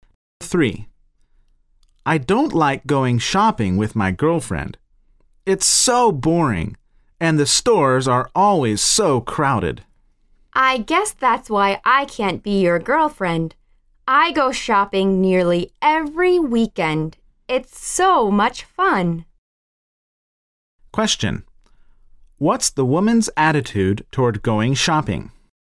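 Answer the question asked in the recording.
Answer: She loves it; it's fun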